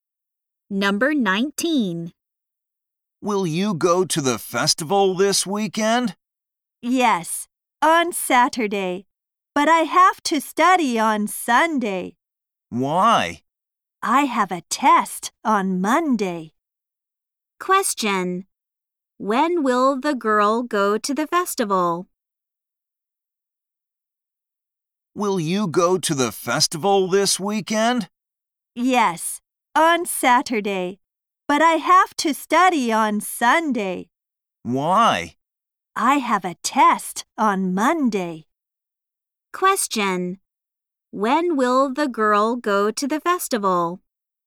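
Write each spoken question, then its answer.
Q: When will the girl go to the festival?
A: On Saturday.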